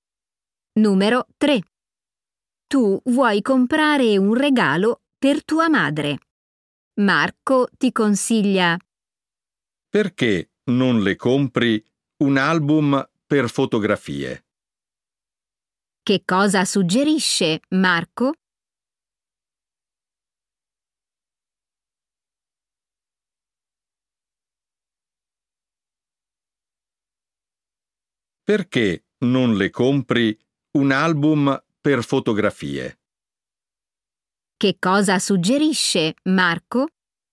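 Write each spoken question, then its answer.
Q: Che cosa suggerisce Marco?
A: un album per fotografie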